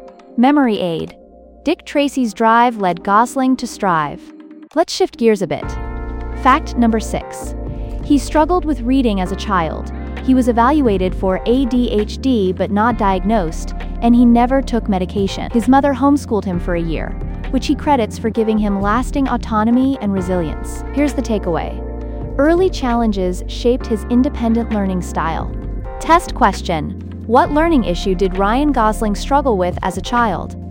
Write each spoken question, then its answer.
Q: What learning issue did Ryan Gosling struggle with as a child?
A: Correct answer, reading.